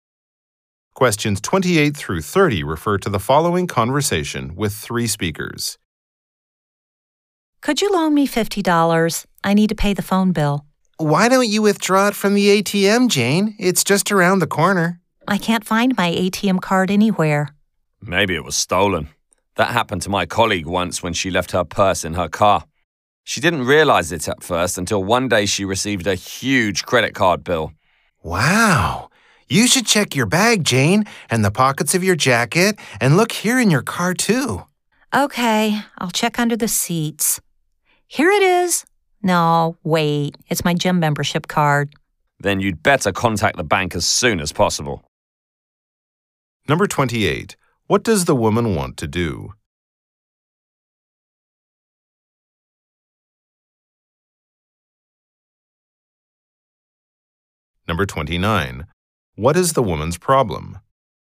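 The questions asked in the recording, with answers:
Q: What does the woman want to do?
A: Borrow $50 to pay the phone bill

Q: What is the woman's problem?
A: She can't find her ATM card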